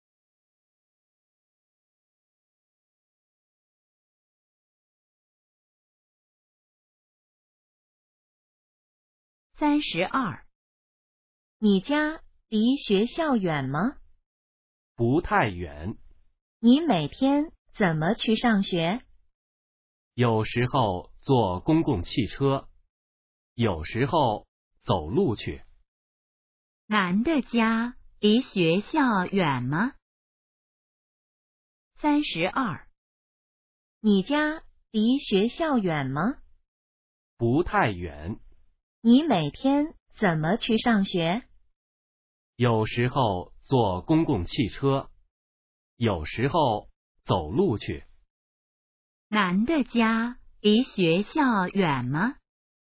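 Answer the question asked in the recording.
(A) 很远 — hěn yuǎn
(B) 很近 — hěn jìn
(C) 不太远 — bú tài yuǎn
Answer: (C) 不太远 — bú tài yuǎn

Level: HSK2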